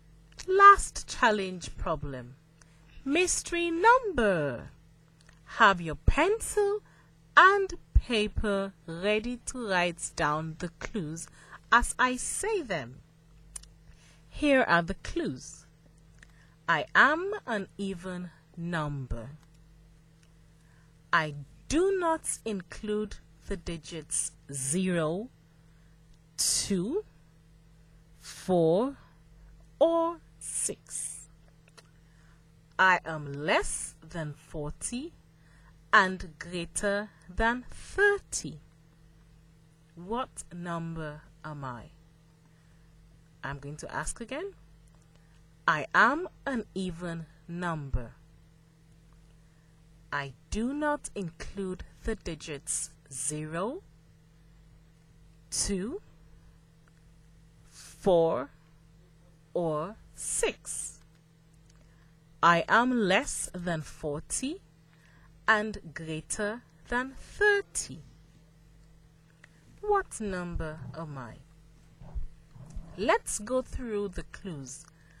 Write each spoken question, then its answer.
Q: What number am I?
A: The mystery number is 38.